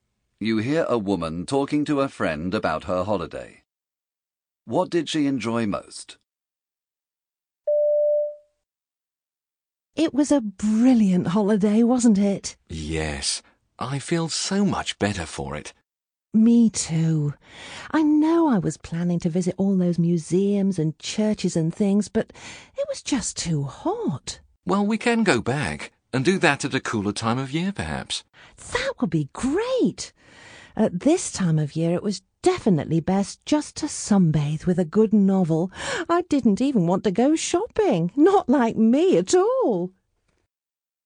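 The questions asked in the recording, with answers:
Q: What did she enjoy most?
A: Sunbathing with a good novel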